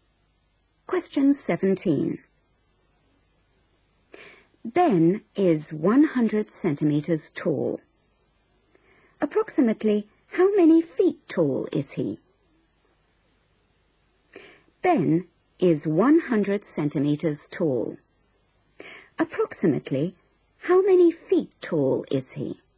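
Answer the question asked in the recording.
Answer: about 3 feet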